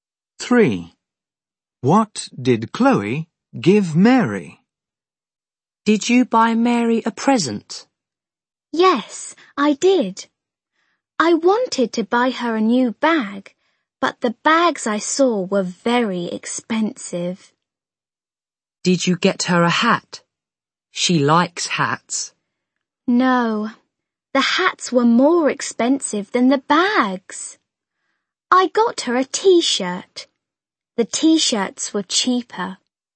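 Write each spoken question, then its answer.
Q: What did Chloe give Mary?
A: A t-shirt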